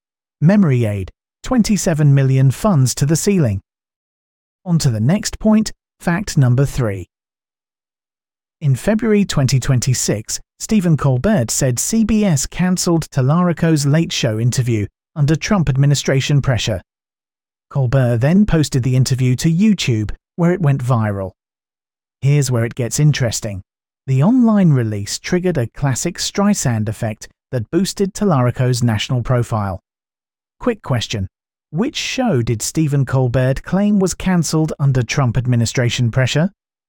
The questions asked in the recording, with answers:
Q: Which show did Stephen Colbert claim was cancelled under Trump administration pressure?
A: Correct answer, The Late Show